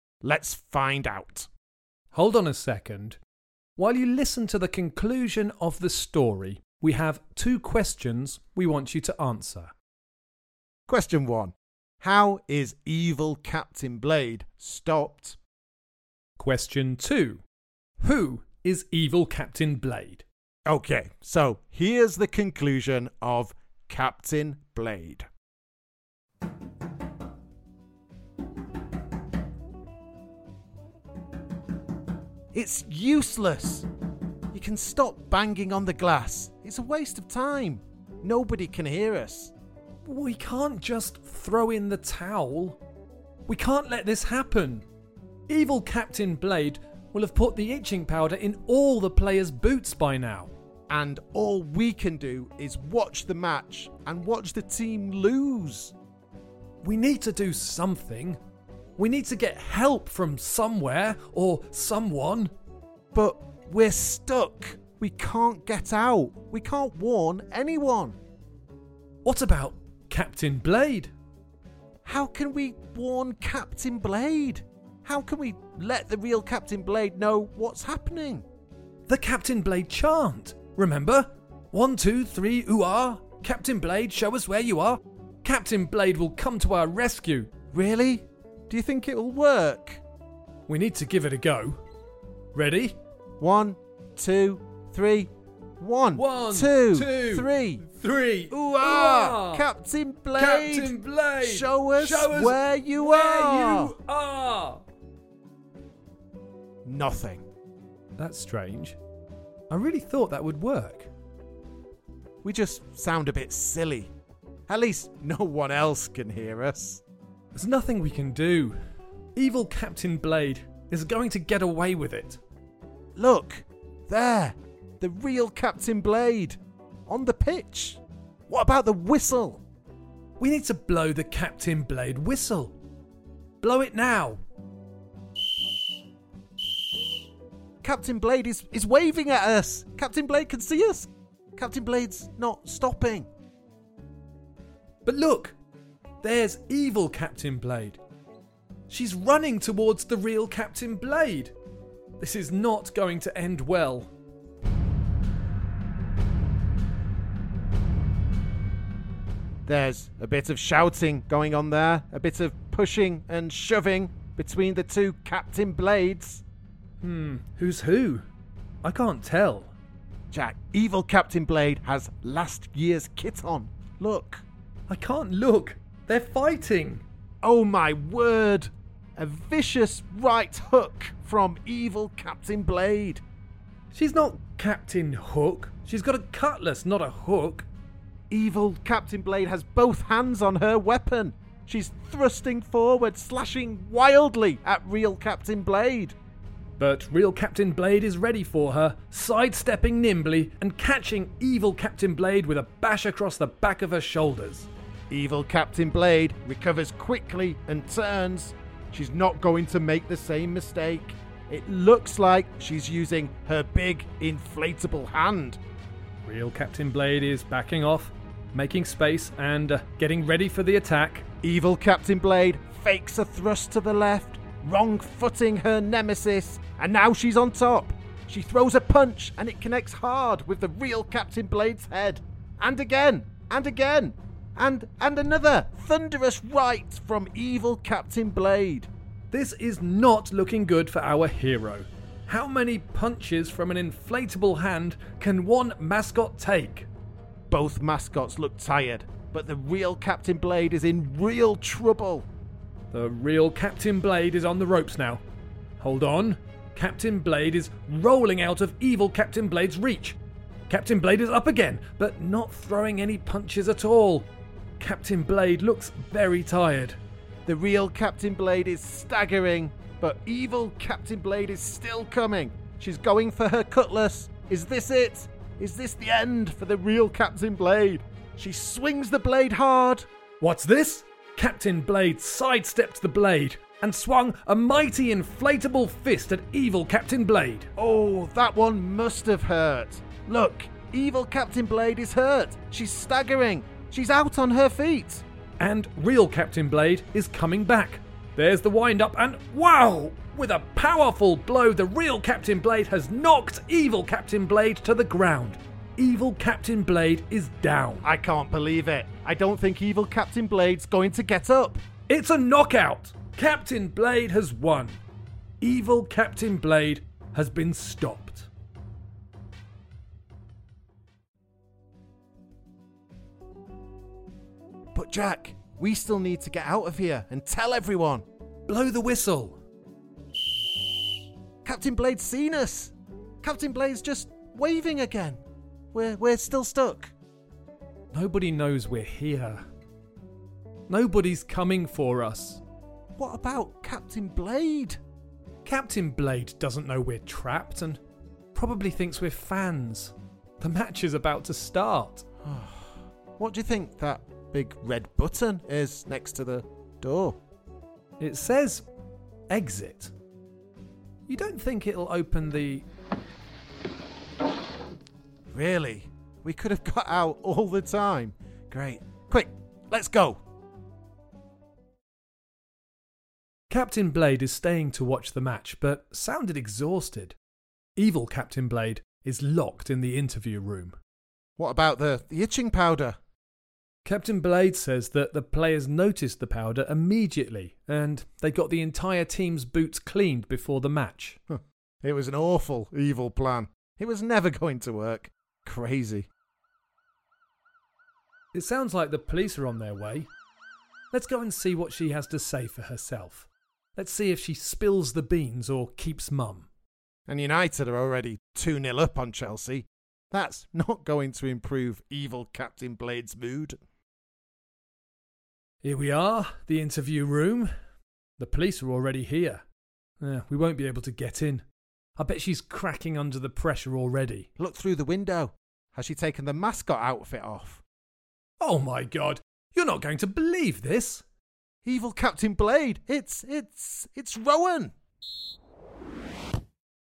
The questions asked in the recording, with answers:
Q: How is evil Captain Blade stopped?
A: It was the real Captain Blade that saved the day and was the hero by winning the fight against the Evil Captain Blade.

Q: Who is evil Captain Blade?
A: At the end of the roleplay, it was revealed that Evil Captain Blade was Rowan.